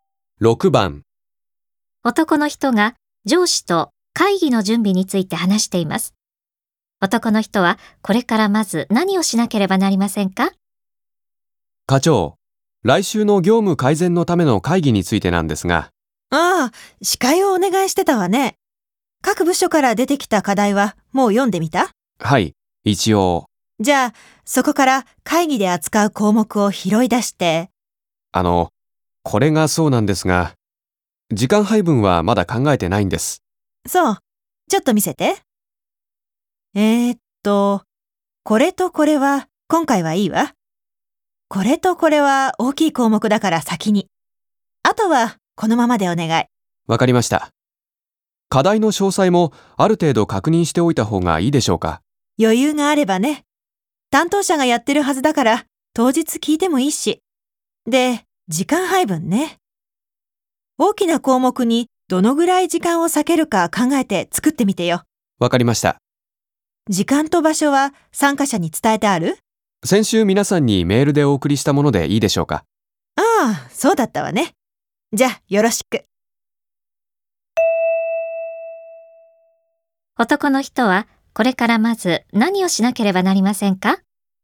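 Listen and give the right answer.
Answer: 会議の項目の時間配分を考えて作る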